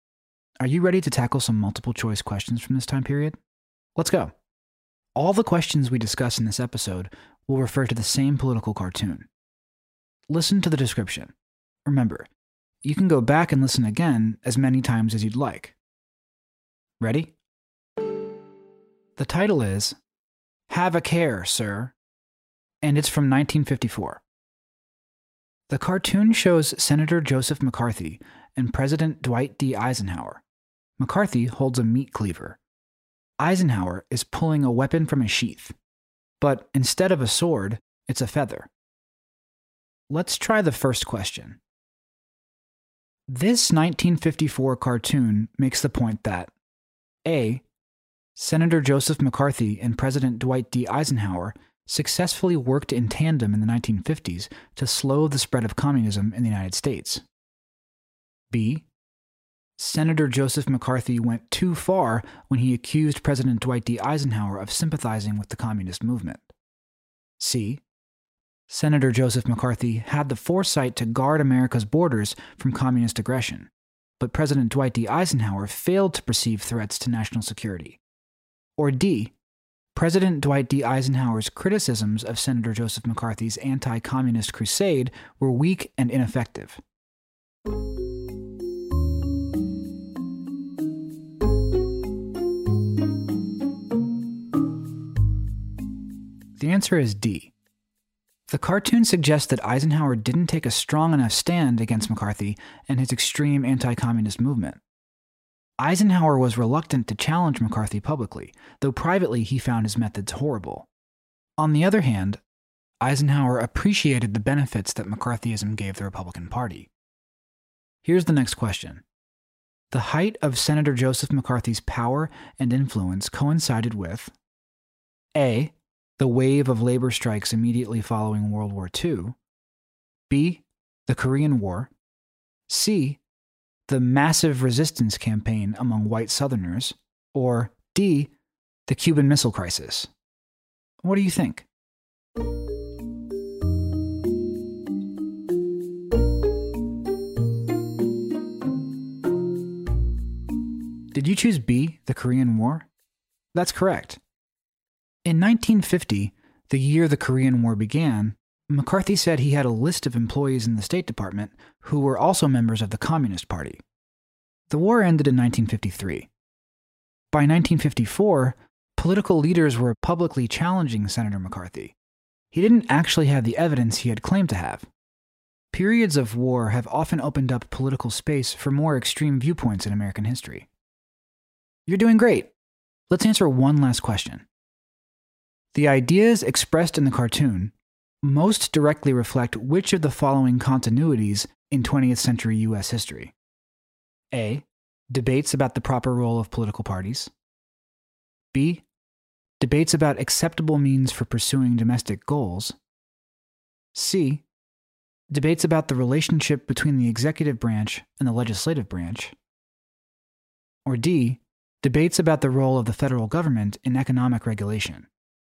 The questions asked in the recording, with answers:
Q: This 1954 cartoon makes the point that A.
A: The answer is D.

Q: The height of Senator Joseph McCarthy's power and influence coincided with A.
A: Did you choose B, the Korean War?